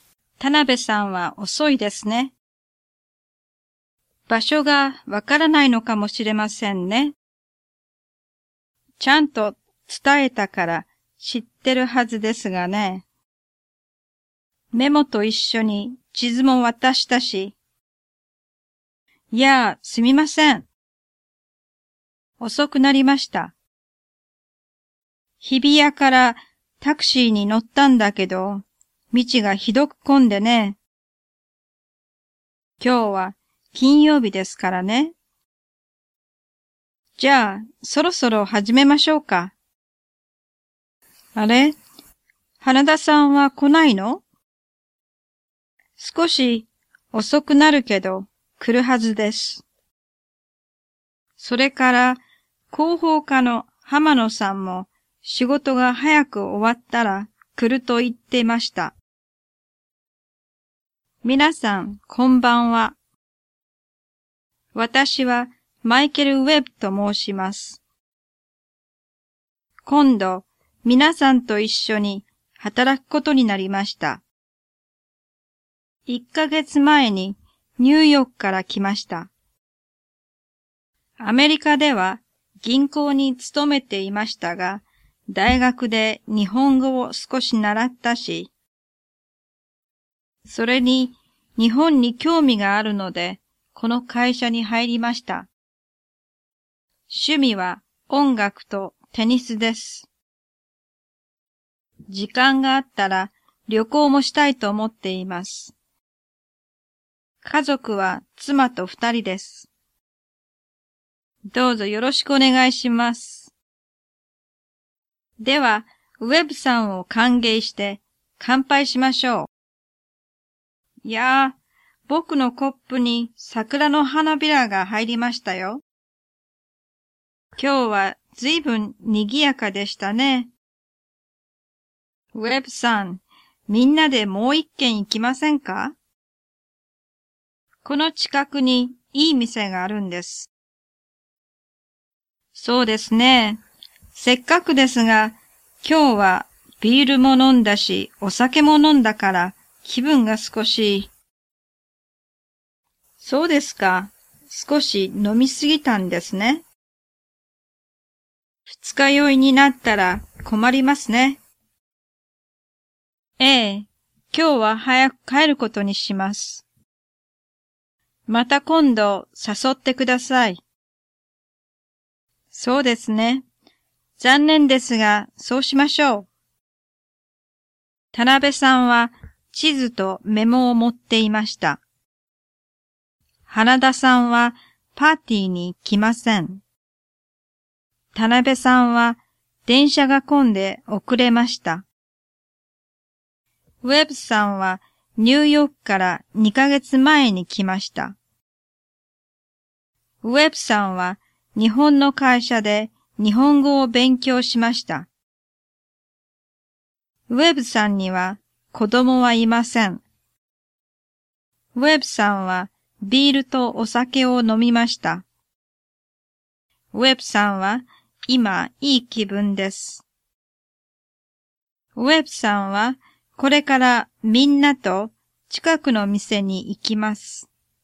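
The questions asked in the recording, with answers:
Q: 田辺さんは地図とメモを持っていました。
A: 正しい

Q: 花田さんはパーティーに来ません。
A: 正しくない(遅れて来るはず)

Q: 田辺さんは電車が混んで遅れました。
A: 正しくない(タクシーで道が混んだ)

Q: ウェブさんはニューヨークから2ヶ月前に来ました。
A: 正しくない(一ヶ月前)

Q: ウェブさんは日本の会社で日本語を勉強しました。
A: 正しくない(大学で習った)

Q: ウェブさんには子供はいません。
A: 正しい

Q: ウェブさんはビールとお酒を飲みました。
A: 正しい

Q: ウェブさんは今いい気分です。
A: 正しくない

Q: ウェブさんはこれからみんなと近くの店に行きます。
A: 正しくない(早く帰る)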